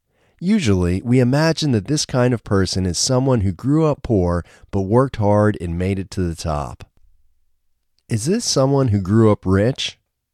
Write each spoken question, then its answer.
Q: Is this someone who grew up rich?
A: No, this isn't someone who grew up rich.